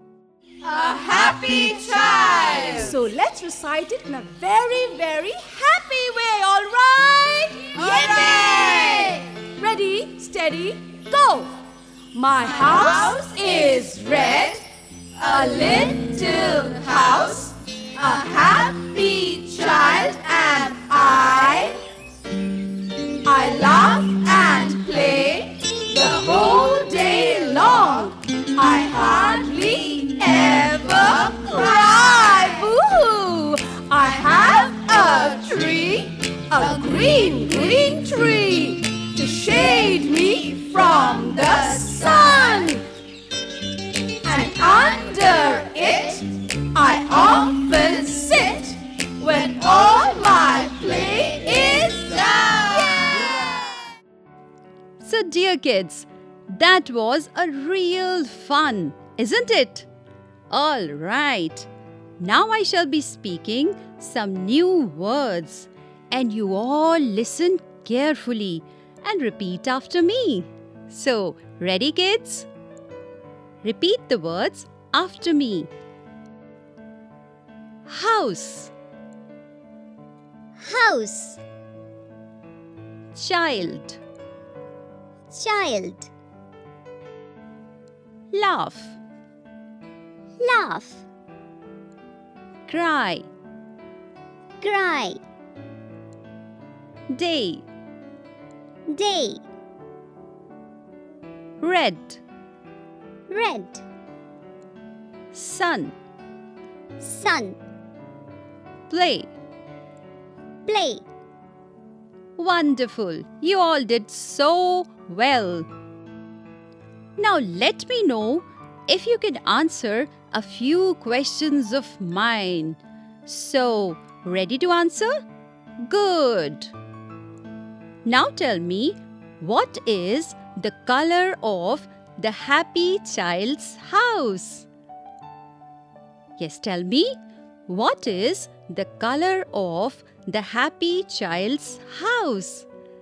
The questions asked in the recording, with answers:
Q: what is the color of the happy child's house?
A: Red color.